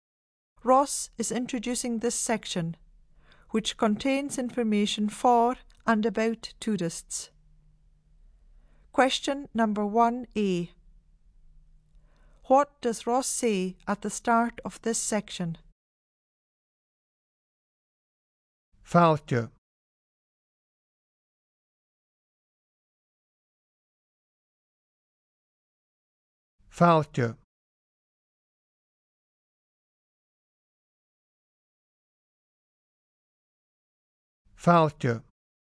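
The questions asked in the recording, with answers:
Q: What does Ross say at the start of this section?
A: Welcome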